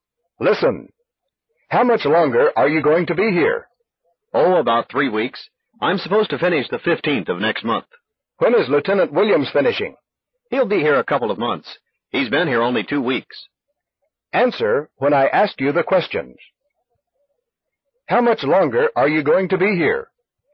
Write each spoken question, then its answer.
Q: How much longer are you going to be here?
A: Oh, about 3 weeks. I'm supposed to finish the 15th of next month.